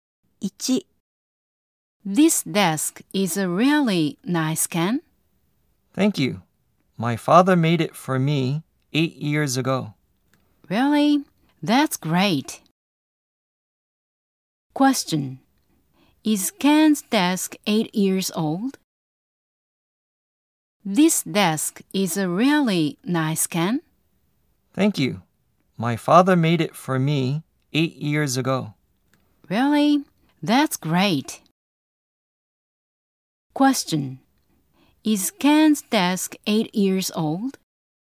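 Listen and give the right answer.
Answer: Yes, it is.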